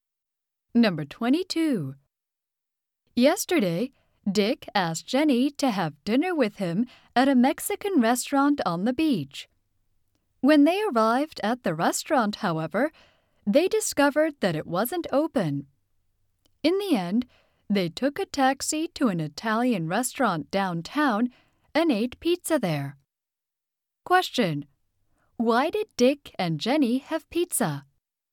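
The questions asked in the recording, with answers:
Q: Why did Dick and Jenny have pizza?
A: The Mexican restaurant wasn't open.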